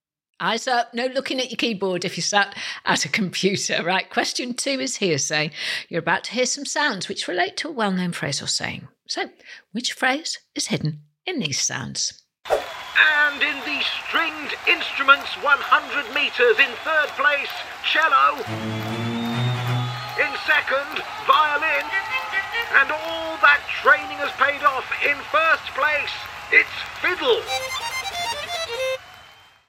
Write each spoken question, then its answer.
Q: So, which phrase is hidden in these sounds?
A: The answer was fit as a fiddle.